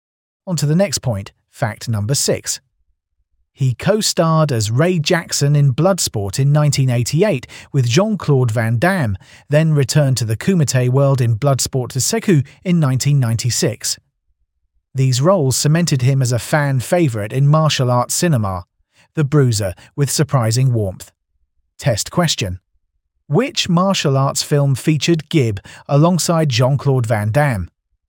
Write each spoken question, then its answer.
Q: Which martial arts film featured Gibb alongside Jean-Claude Van Damme?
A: Correct answer. Bloodsport.